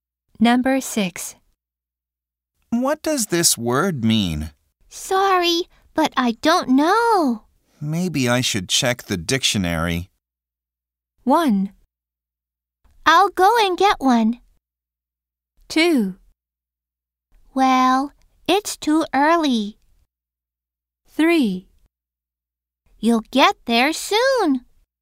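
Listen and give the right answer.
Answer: 1: I'll go and get one.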